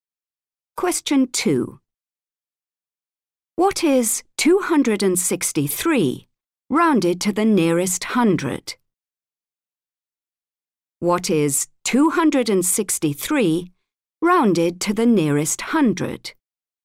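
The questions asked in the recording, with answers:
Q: What is 263 rounded to the nearest hundred?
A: 300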